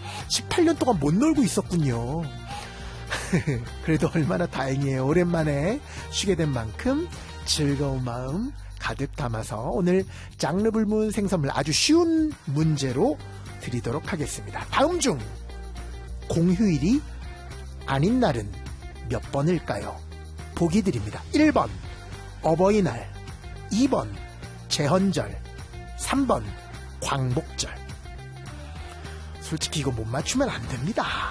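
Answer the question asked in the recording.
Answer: 1번: 어버이날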